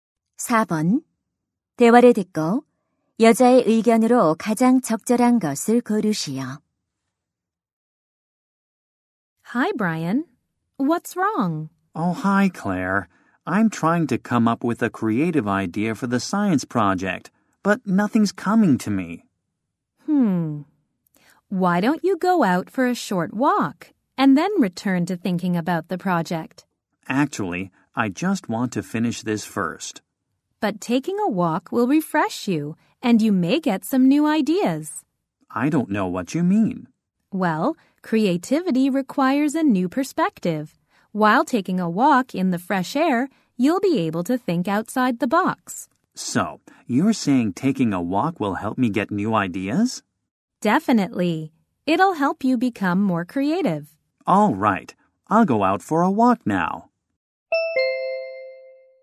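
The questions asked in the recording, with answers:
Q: 대화를 듣고 여자의 의견으로 가장 적절한 것을 고르시오.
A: 산책은 창의적인 아이디어를 얻는 데 도움이 된다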